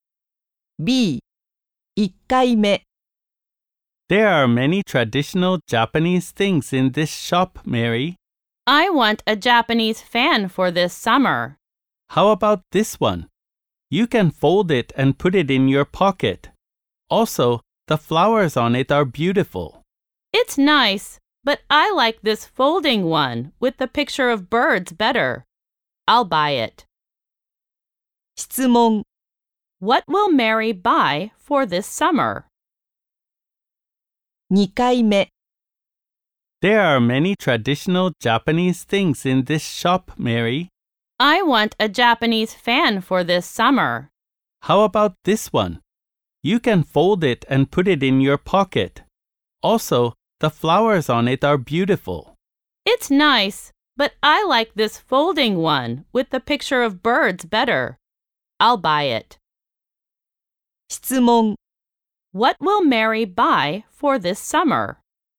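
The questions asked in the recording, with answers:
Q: What will Mary buy for this summer?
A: A folding Japanese fan with a picture of birds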